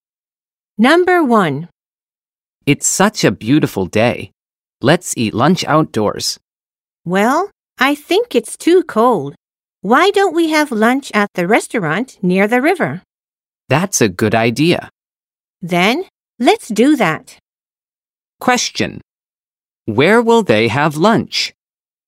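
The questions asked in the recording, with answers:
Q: Where will they have lunch?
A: At the restaurant near the river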